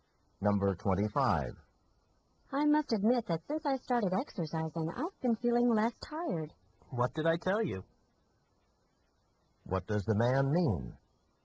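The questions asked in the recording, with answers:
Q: What does the man mean?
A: He had told her exercise would help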